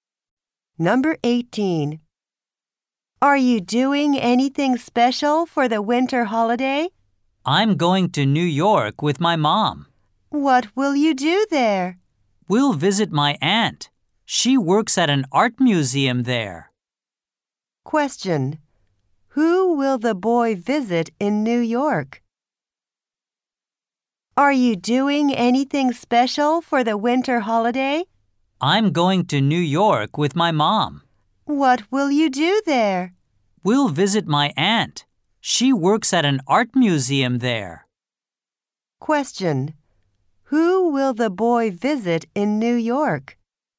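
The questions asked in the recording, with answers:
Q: Who will the boy visit in New York?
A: His aunt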